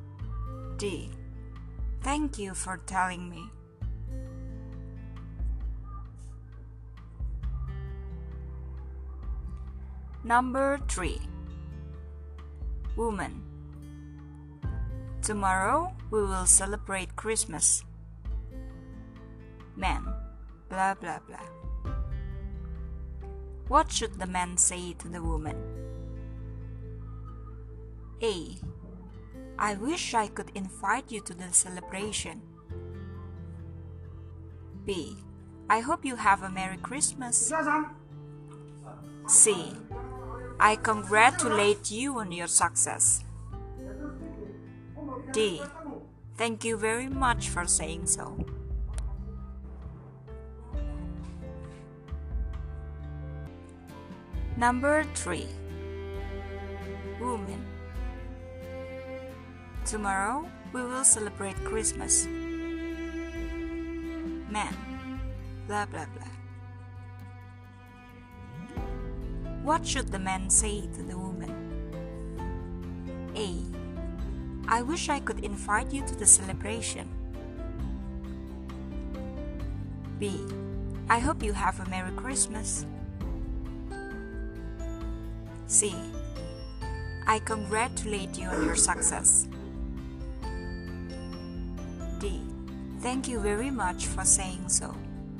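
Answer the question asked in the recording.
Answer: B: I hope you have a Merry Christmas.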